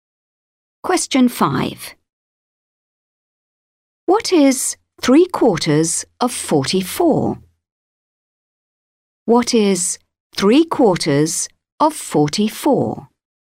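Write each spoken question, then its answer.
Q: What is 3/4 of 44?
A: 33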